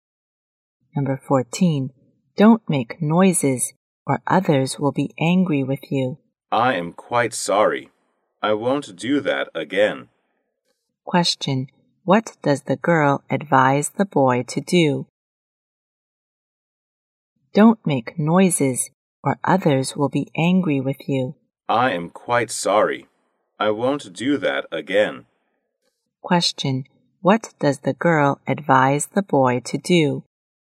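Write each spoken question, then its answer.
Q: What does the girl advise the boy to do?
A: Not to make noise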